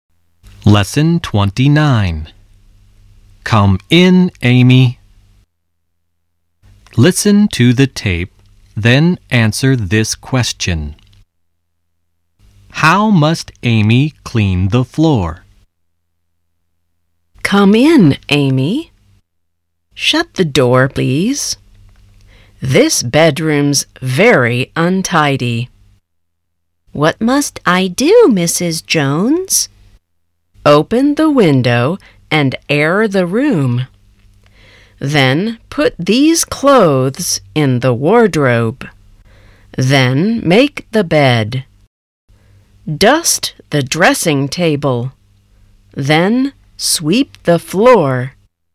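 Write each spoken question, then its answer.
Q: How must Amy clean the floor?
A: She must sweep it.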